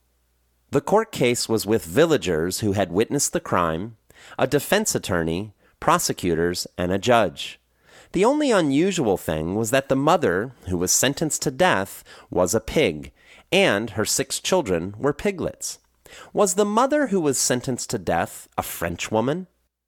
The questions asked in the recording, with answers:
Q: Was the mother who was sentenced to death a French woman?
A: No, she wasn't a French woman.